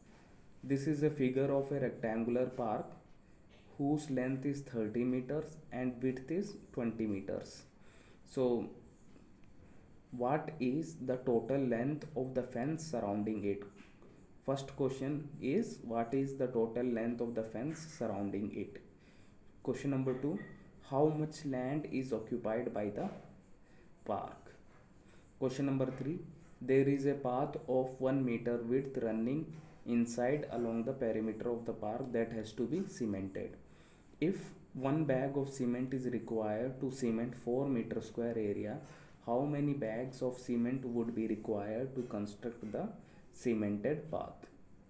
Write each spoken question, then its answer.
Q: First question is, what is the total length of the fence surrounding it?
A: Perimeter is 100 meters.

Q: Question number 2, how much land is occupied by the park?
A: which is 600 square meters.

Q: If 1 bag of cement is required to cement 4 meter square area, how many bags of cement would be required to construct the cemented path?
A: Therefore, number of cement bags used is equals to 24.